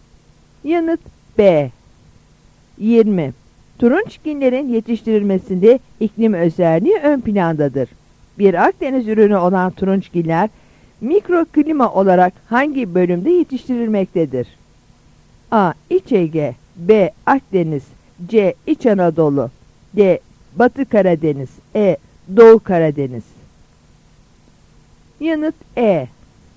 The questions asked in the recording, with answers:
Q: Bir Akdeniz ürünü olan turunçginler mikroklima olarak hangi bölümde yetiştirilmektedir?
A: Yanıt E.